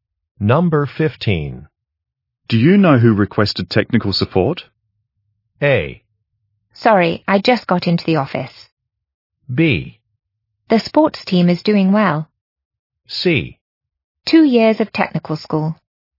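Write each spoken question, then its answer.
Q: Do you know who requested technical support?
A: A: Sorry, I just got into the office.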